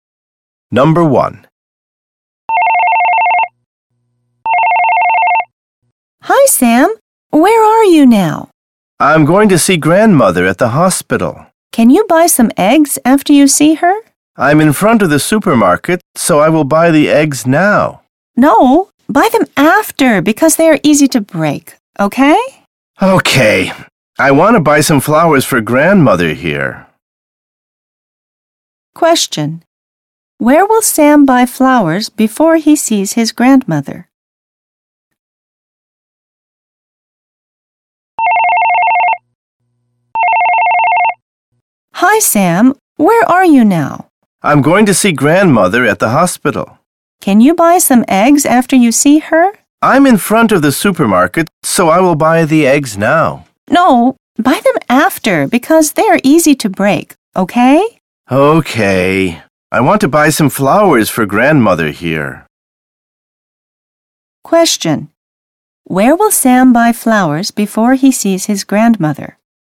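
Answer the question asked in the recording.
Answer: At the supermarket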